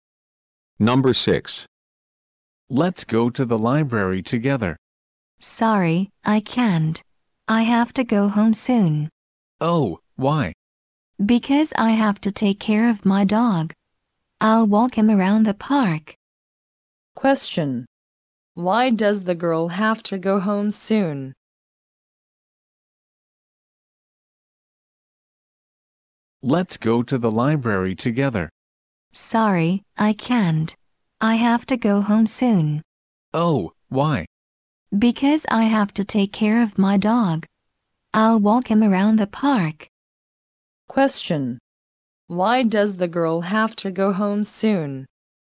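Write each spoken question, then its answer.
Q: Why does the girl have to go home soon?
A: Because she has to take care of her dog (walk him around the park).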